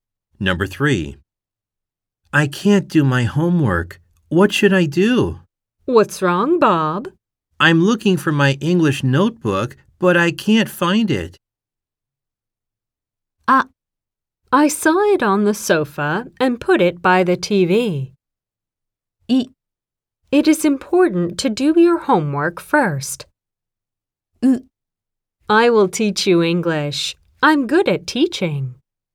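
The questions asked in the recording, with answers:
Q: I'm looking for my English notebook, but I can't find it.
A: ア: I saw it on the sofa and put it by the TV.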